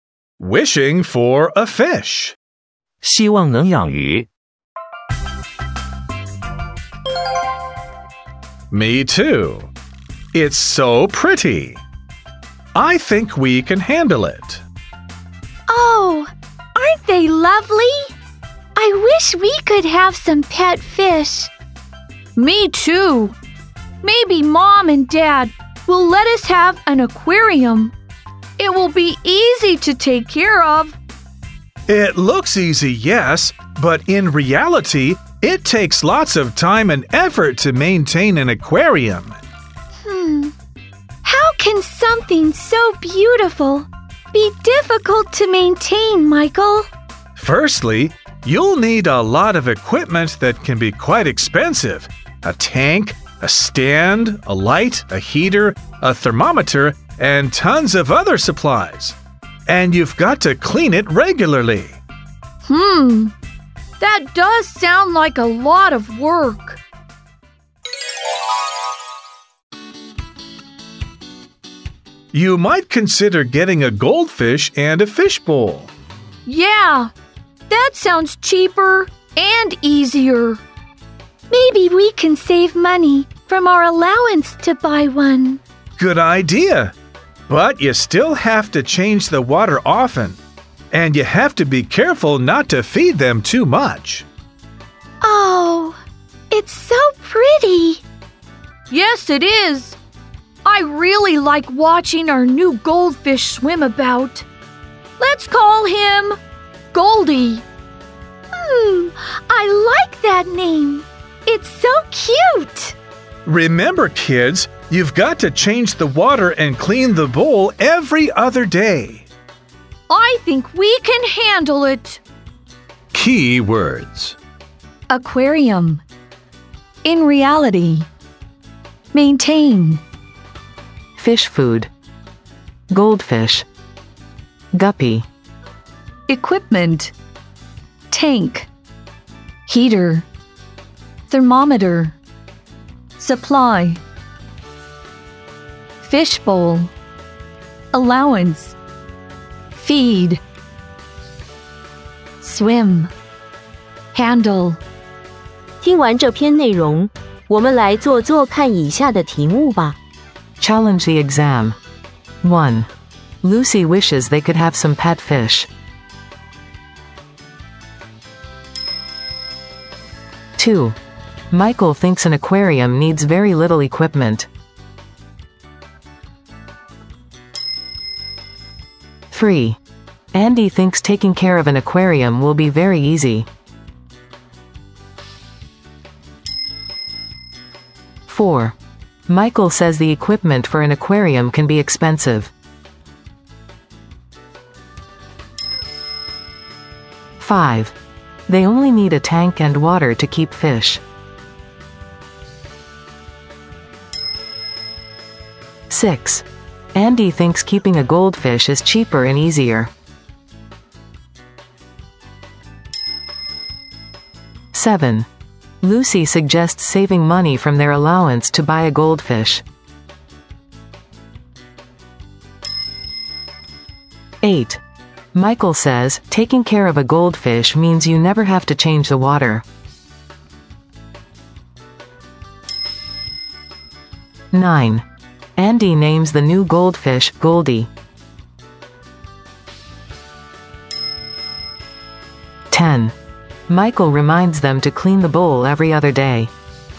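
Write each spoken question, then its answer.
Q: Michael thinks an aquarium needs very little equipment.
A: False

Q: Michael says the equipment for an aquarium can be expensive.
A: True

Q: They only need a tank and water to keep fish.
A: False

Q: Michael says, taking care of a goldfish means you never have to change the water.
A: False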